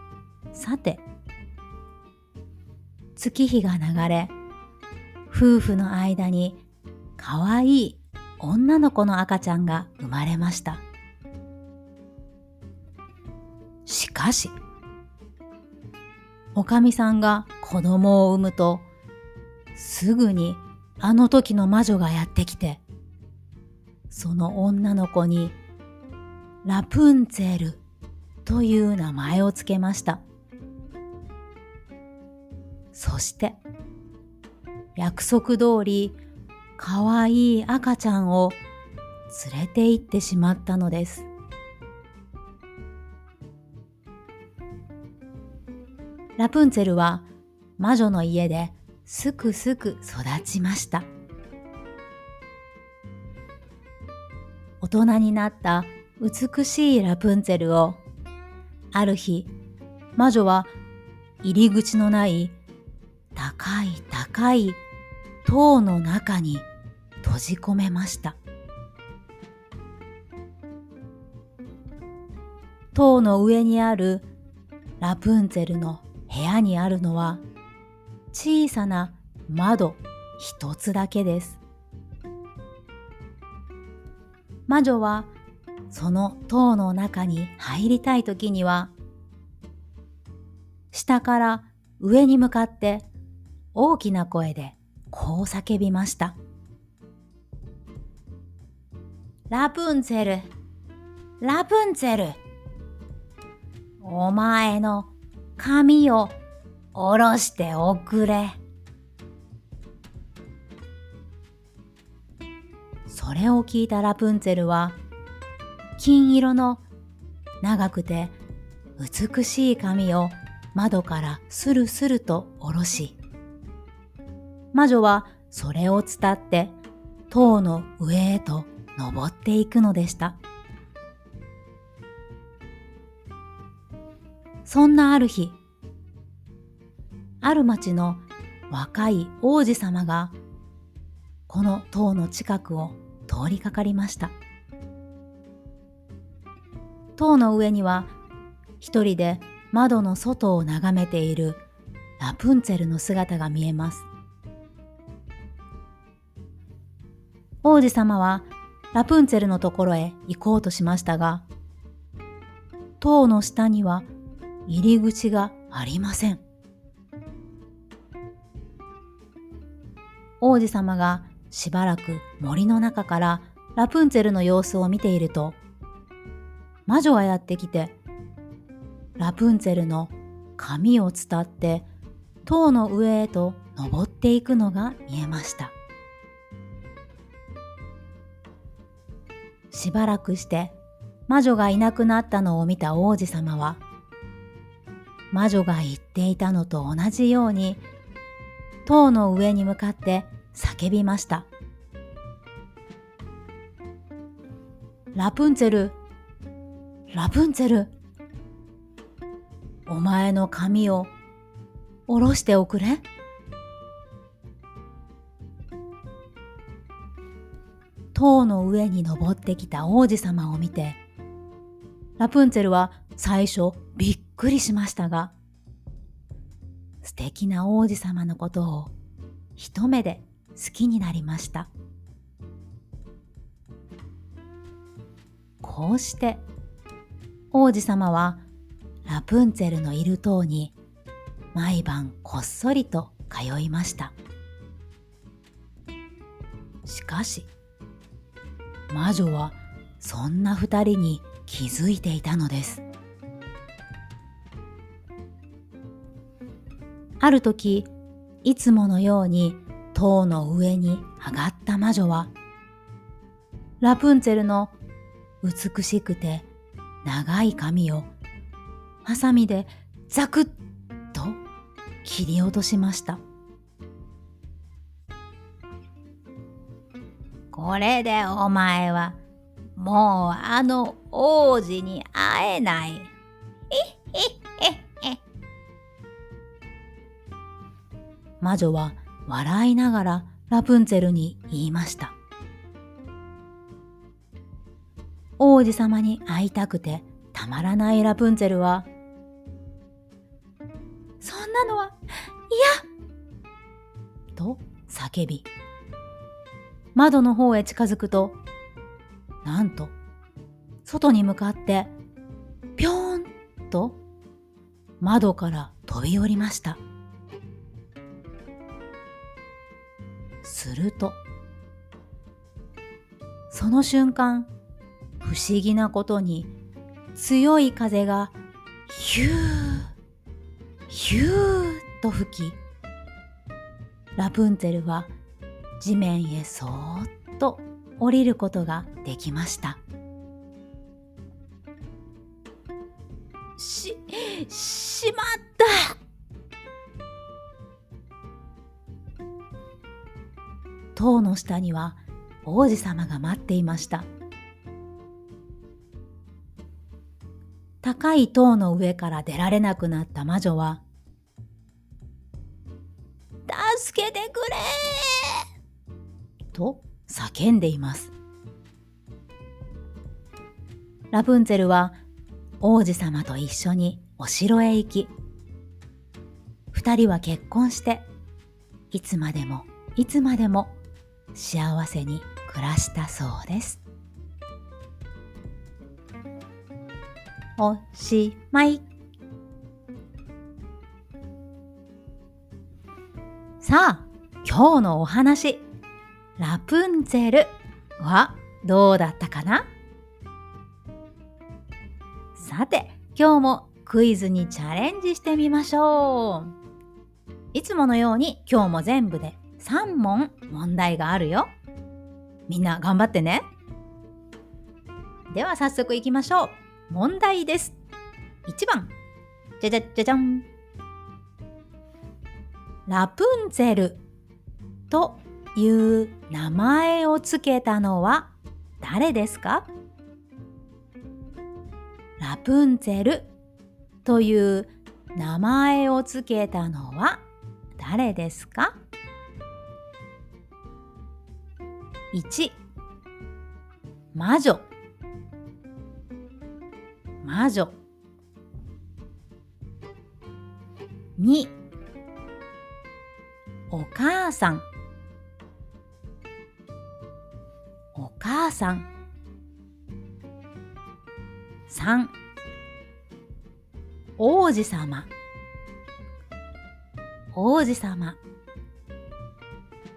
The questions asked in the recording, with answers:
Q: ラプンツェルという名前をつけたのは誰ですか?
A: 1番の魔女でした。